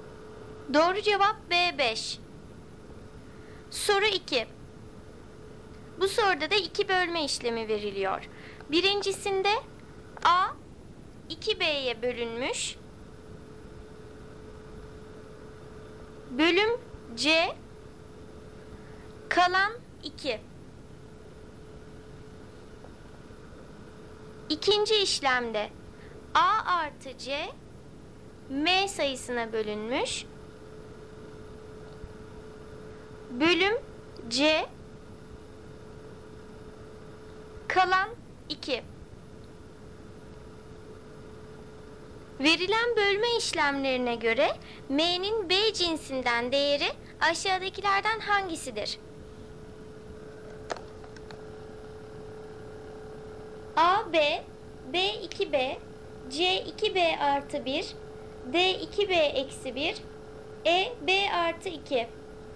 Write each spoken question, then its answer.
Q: Verilen bölme işlemlerine göre M'nin B cinsinden değeri aşağıdakilerden hangisidir?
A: Doğru cevap C 2B artı 1.